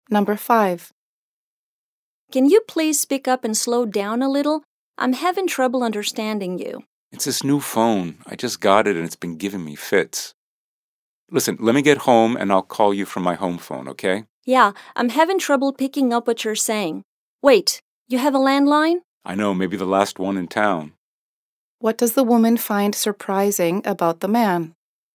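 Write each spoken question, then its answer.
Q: What does the woman find surprising about the man?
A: That he still has a landline (home phone).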